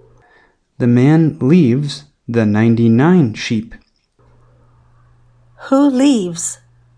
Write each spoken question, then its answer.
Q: Who leaves?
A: The man leaves.